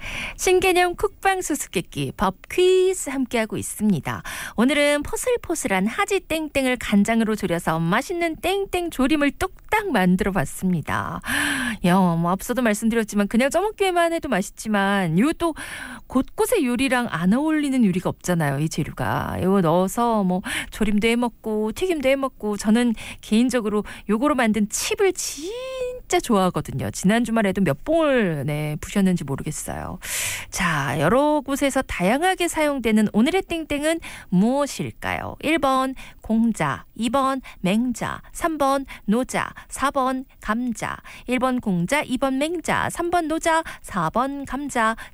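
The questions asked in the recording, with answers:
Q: 자, 여러 곳에서 다양하게 사용되는 오늘의 땡땡은 무엇일까요?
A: 4번: 감자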